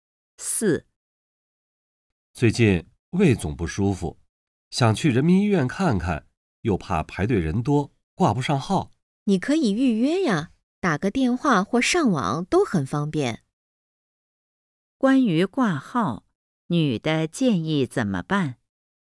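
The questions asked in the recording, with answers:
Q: 关于挂号,女的建议怎么办?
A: 打电话或上网预约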